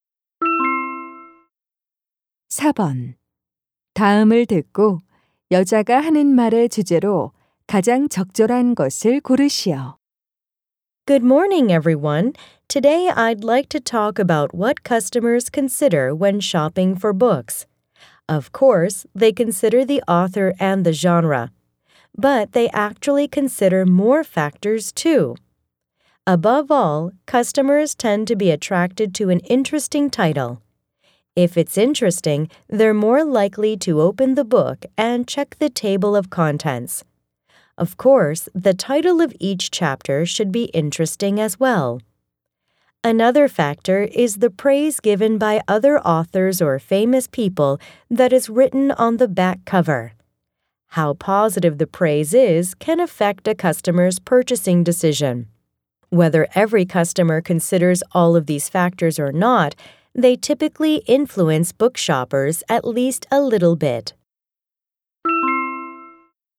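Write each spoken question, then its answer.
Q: 다음을 듣고 여자가 하는 말의 주제로 가장 적절한 것을 고르시오.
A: 고객이 책을 살 때 고려하는 요소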